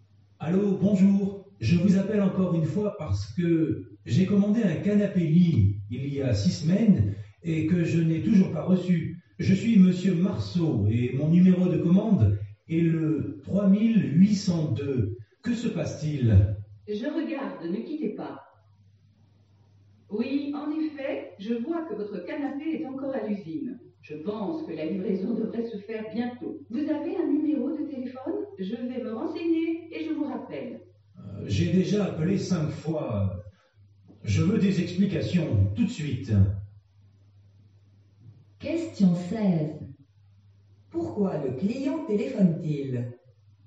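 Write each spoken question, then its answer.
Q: Pourquoi le client téléphone-t-il?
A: Parce qu'il n'a toujours pas reçu le canapé-lit commandé il y a 6 semaines.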